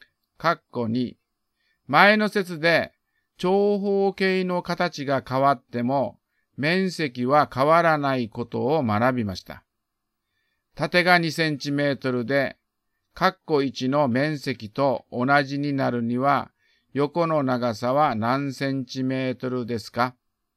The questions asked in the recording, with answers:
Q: 縦が2センチメートルで、括弧1の面積と同じになるには、横の長さは何センチメートルですか?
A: 12割る2は6。だから答えは6センチメートルです。